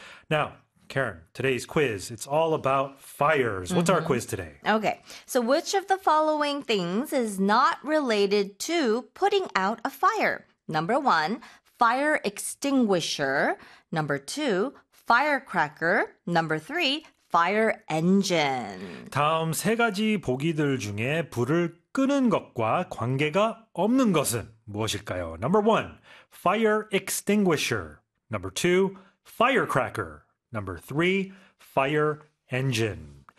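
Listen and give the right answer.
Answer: 2: firecracker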